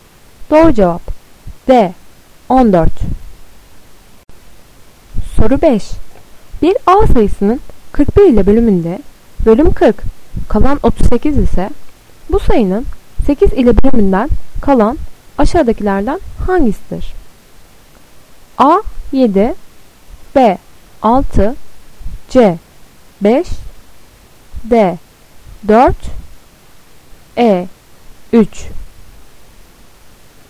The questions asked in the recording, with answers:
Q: Bir A sayısının 41 ile bölümünde bölüm 40 kalan 38 ise bu sayının 8 ile bölümünden kalan aşağıdakilerden hangisidir?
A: Doğru cevap B. 6